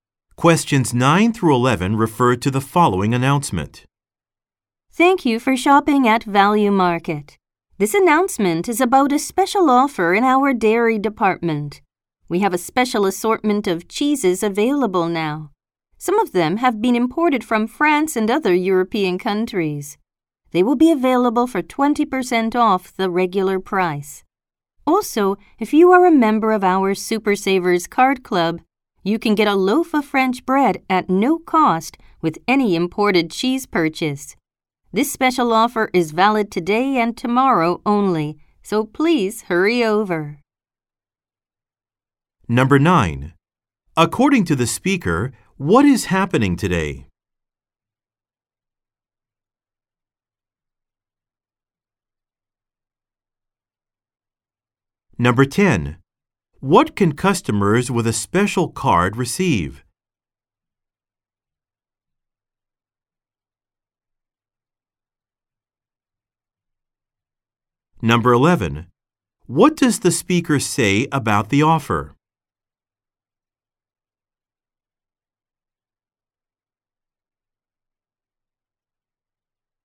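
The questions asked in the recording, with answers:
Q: According to the speaker, what is happening today?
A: A special sale on cheeses (20% off)

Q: What can customers with a special card receive?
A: A free loaf of French bread with an imported cheese purchase

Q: What does the speaker say about the offer?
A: It is valid today and tomorrow only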